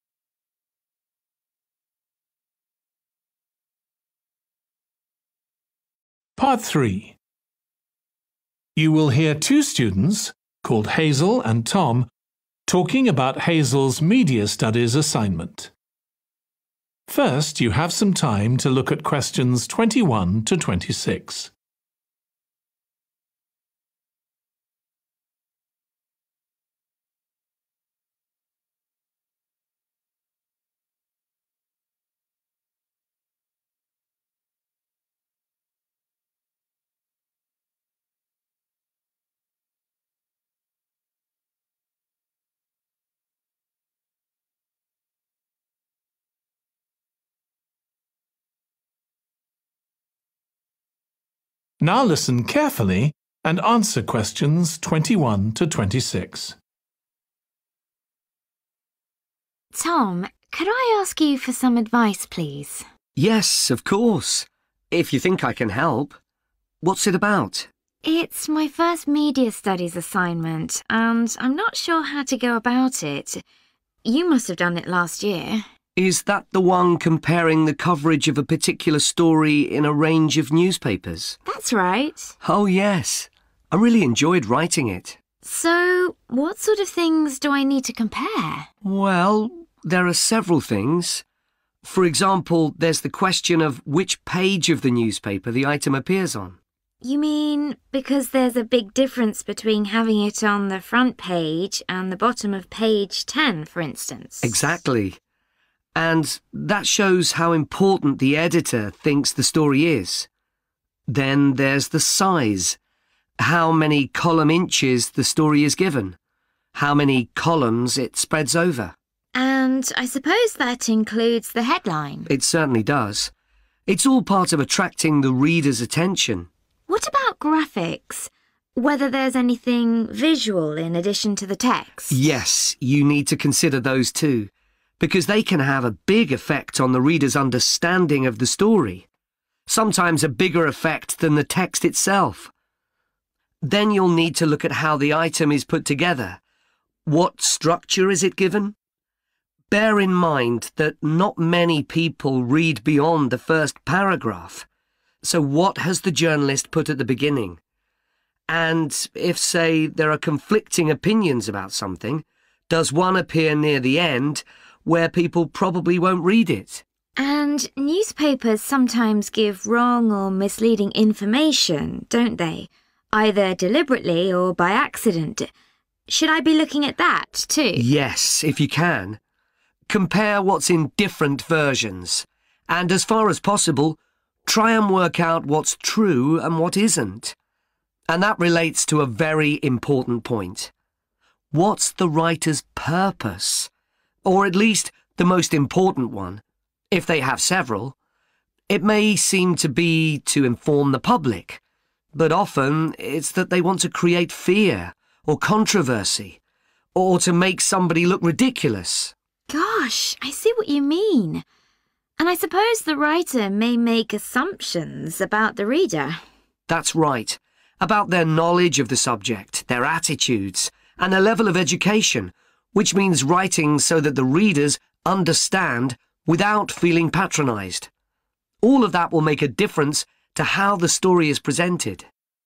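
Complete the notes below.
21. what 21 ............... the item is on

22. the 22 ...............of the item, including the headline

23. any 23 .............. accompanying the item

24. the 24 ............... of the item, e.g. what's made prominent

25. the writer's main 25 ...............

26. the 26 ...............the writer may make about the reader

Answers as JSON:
{"21": "page", "22": "size", "23": "graphics", "24": "structure", "25": "purpose", "26": "assumptions"}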